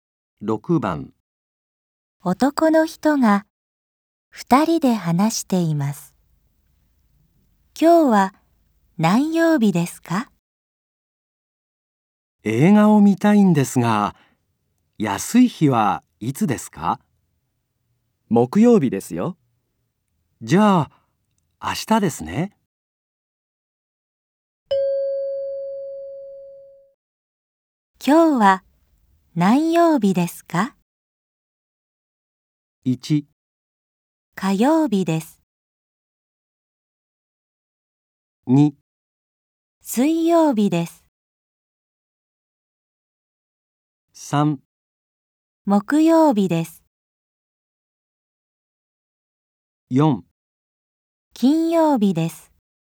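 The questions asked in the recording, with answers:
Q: 今日は何曜日ですか?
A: 2: 水曜日です。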